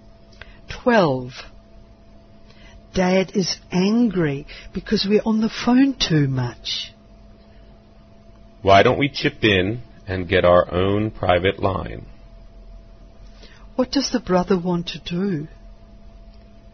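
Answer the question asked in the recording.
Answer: Share the cost of their own private phone line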